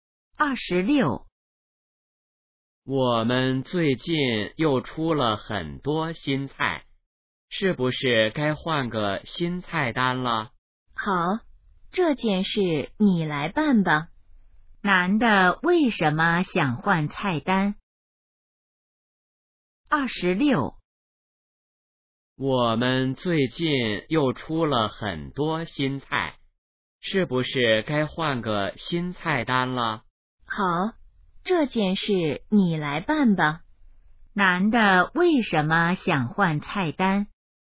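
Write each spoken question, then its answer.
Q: 男的为什么想换菜单?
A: 出了很多新菜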